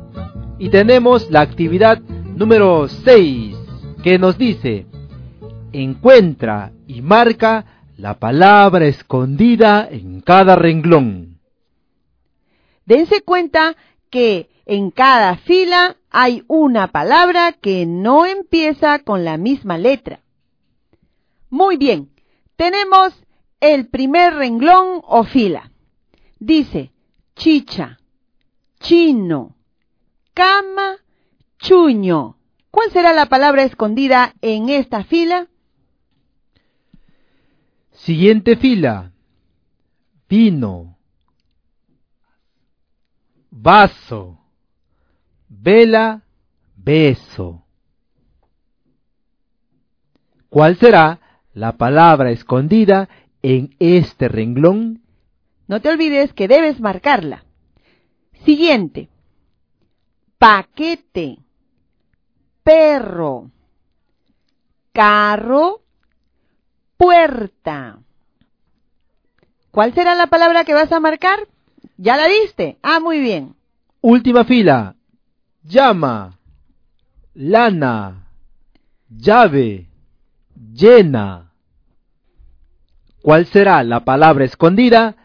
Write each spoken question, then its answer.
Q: ¿Cuál será la palabra escondida en esta fila?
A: Cama.

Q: ¿Cuál será la palabra escondida en este renglón?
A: Estaba más difícil. Es beso.

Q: ¿Cuál será la palabra que vas a marcar?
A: carro.

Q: ¿Cuál será la palabra escondida?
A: Es la palabra lana.